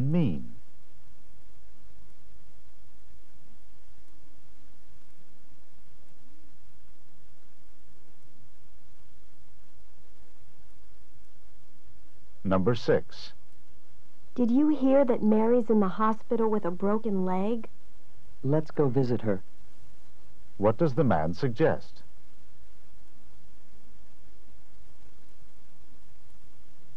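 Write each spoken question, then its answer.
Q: What does the man suggest?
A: Visiting Mary.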